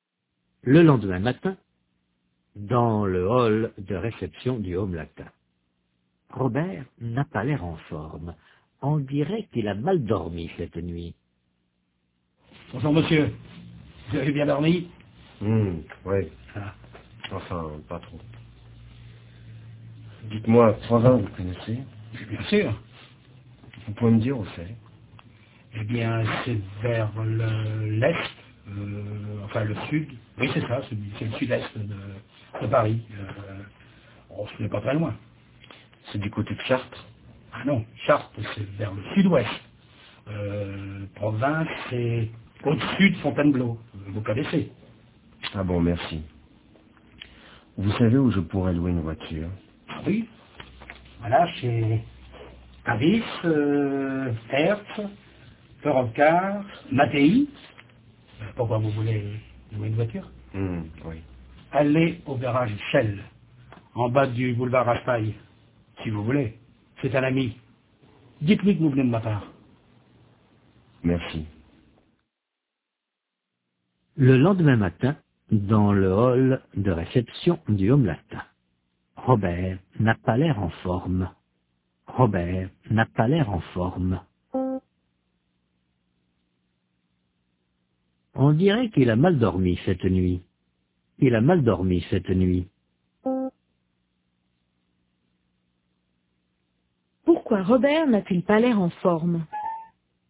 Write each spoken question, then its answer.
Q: Pourquoi Robert n'a-t-il pas l'air en forme?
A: Parce qu'il a mal dormi.